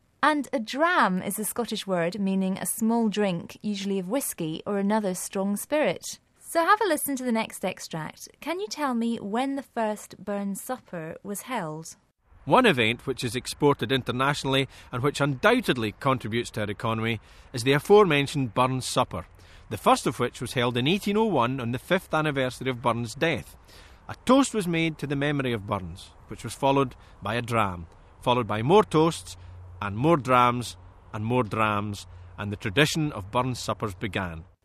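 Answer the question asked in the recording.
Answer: In 1801, on the 5th anniversary of Burns' death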